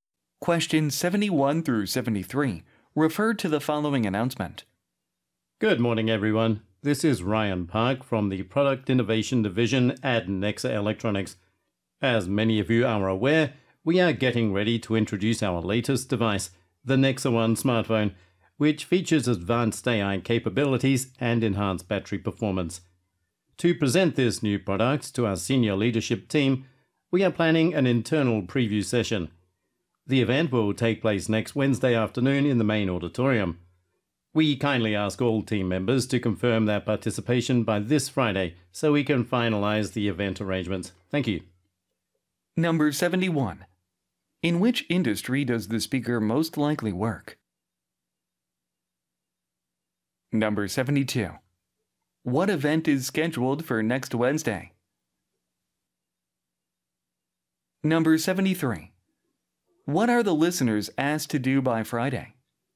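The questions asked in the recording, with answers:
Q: In which industry does the speaker most likely work?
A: Electronics

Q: What event is scheduled for next Wednesday?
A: An internal preview session of a new smartphone

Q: What are the listeners asked to do by Friday?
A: Confirm their participation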